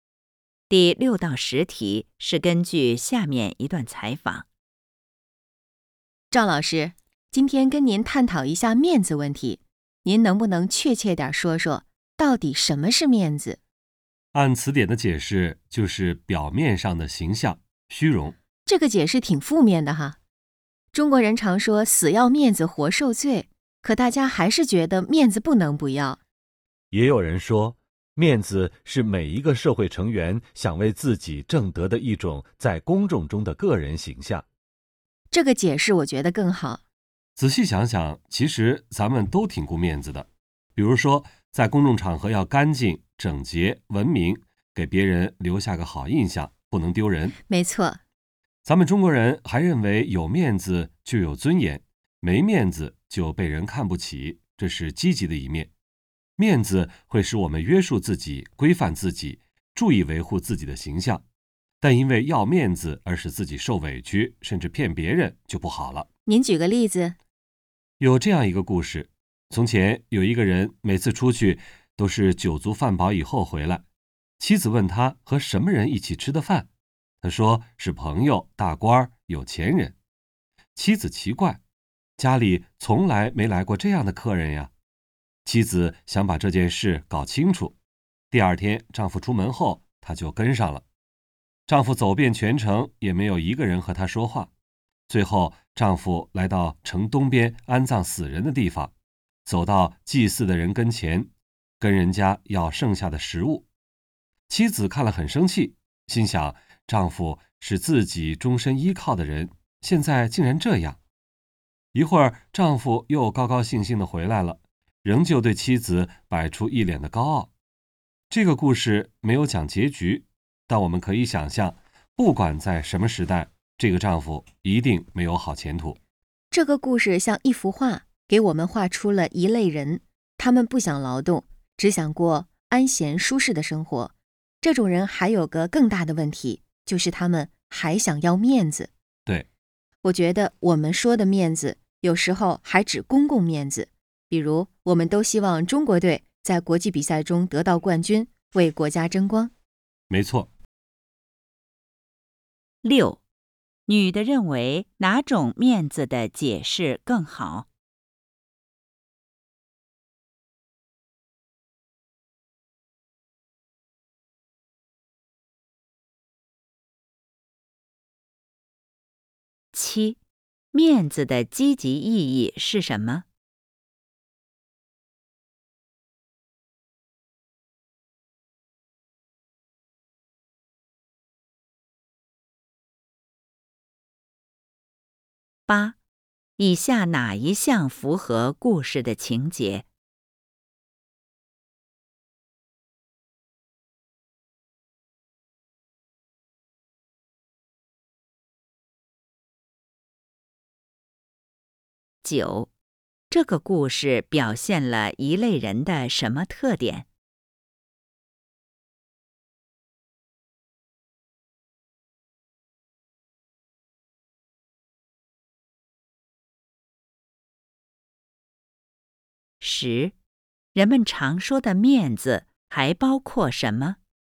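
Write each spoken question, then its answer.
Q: 面子的积极意义是什么?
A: 有面子就有尊严,使我们约束自己、规范自己、注意维护自己的形象

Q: 这个故事表现了一类人的什么特点?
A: 不想劳动,只想过安闲舒适的生活,还想要面子

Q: 人们常说的面子还包括什么?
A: 公共面子,如为国家争光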